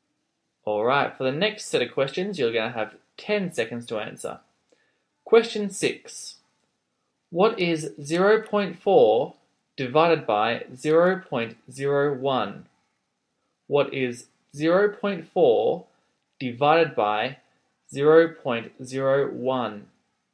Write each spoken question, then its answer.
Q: What is 0.4 divided by 0.01?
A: your answer should be 40.